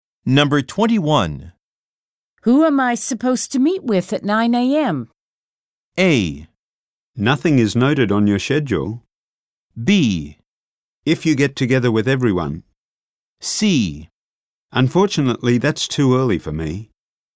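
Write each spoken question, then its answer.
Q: Who am I supposed to meet with at 9 a.m.?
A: A: Nothing is noted on your schedule.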